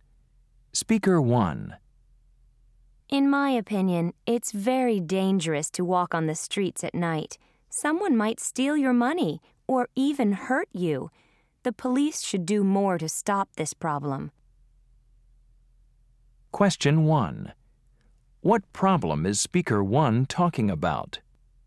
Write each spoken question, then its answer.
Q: What problem is Speaker 1 talking about?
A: Because of crime, I'm afraid.